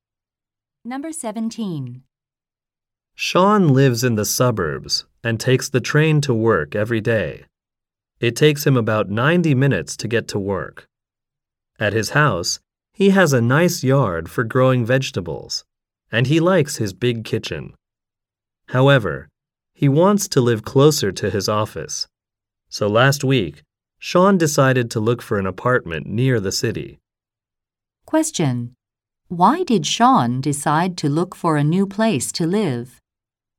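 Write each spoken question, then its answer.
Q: Why did Sean decide to look for a new place to live?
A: He wants to live closer to his office.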